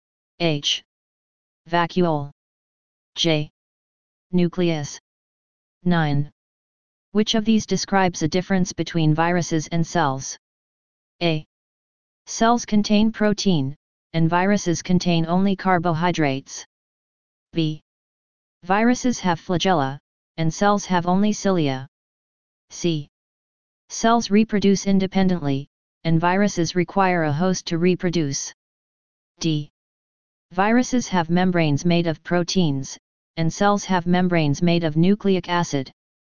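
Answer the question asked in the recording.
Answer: C: Cells reproduce independently, and viruses require a host to reproduce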